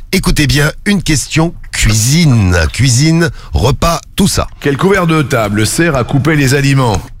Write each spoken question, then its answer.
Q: Quel couvert de table sert à couper les aliments?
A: Le couteau.